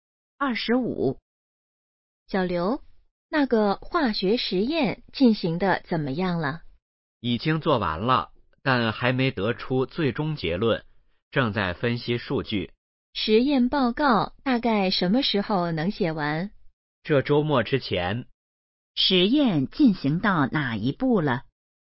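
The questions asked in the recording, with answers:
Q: 实验进行到哪一步了?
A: 正在分析数据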